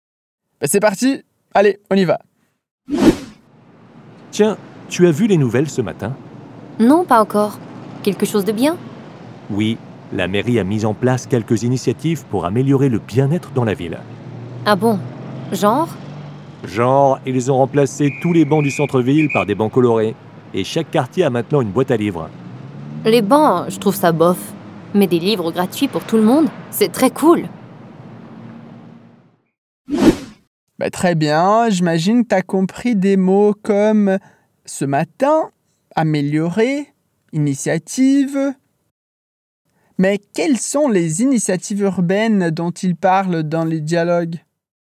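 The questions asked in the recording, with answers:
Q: Mais quelles sont les initiatives urbaines dont ils parlent dans les dialogues ?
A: Tous les bancs du centre-ville ont été remplacés par des bancs colorés, et chaque quartier a maintenant une boîte à livres.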